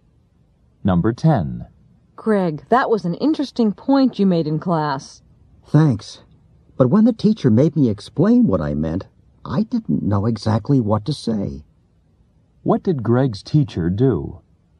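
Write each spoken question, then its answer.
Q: What did Greg's teacher do?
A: Made Greg explain what he meant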